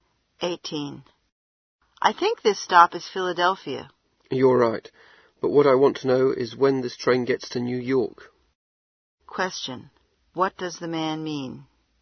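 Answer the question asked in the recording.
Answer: He wants to know when the train arrives in New York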